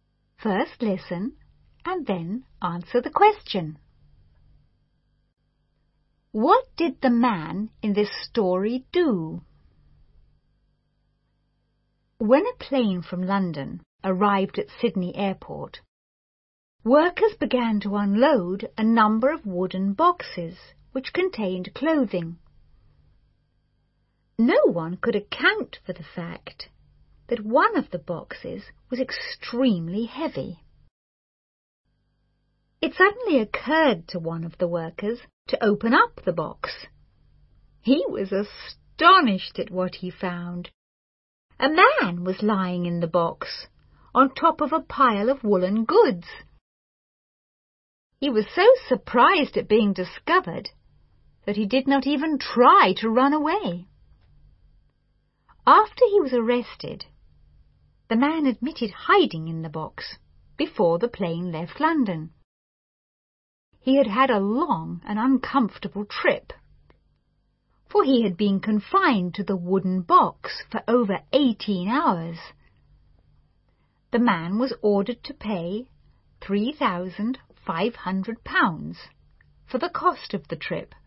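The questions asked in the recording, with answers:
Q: What did the man in this story do?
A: He hid in a wooden box on a plane from London to Sydney to travel without a ticket.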